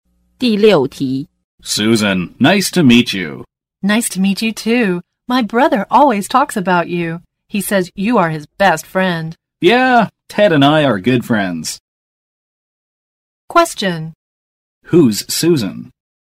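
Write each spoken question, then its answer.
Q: Who's Susan?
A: Ted's sister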